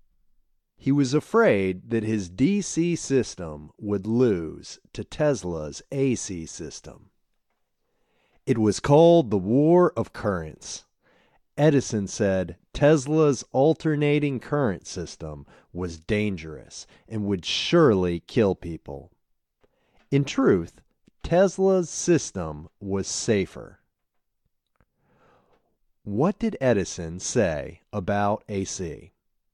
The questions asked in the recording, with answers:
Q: What did Edison say about AC?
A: Edison said it was dangerous and would surely kill people.